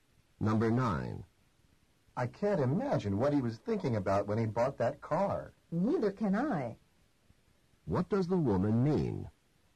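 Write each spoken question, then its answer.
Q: What does the woman mean?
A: She can't understand why he bought the car either.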